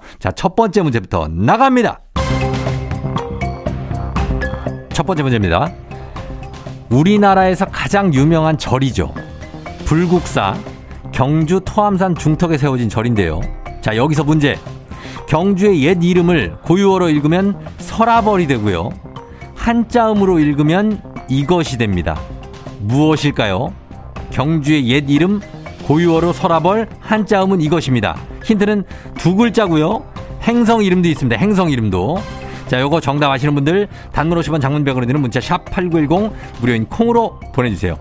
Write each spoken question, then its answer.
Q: 경주의 옛 이름을 고유어로 읽으면 설아벌이 되고요. 한자음으로 읽으면 이것이 됩니다. 무엇일까요?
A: 정답은 두구 두구두구두구두구두구두구두구두구 금성입니다.